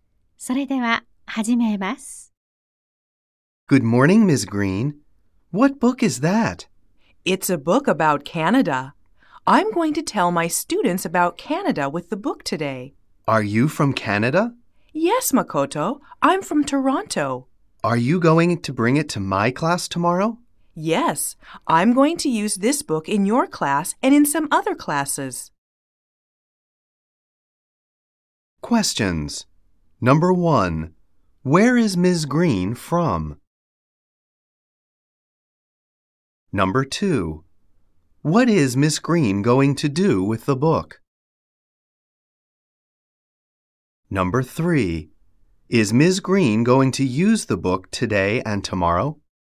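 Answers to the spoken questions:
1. Toronto, Canada
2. Tell her students about Canada
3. Yes, she is.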